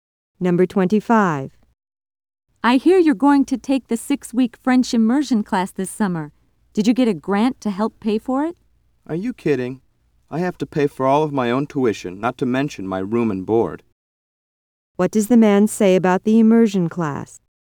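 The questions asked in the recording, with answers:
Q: What does the man say about the immersion class?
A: He has to pay for all of it himself; he didn't get a grant.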